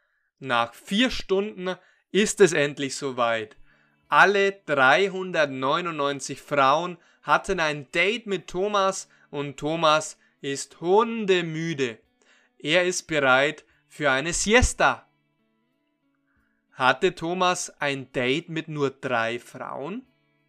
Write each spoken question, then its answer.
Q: Hatte Thomas ein Date mit nur drei Frauen?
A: Nein, er hatte nicht nur ein Date mit drei Frauen.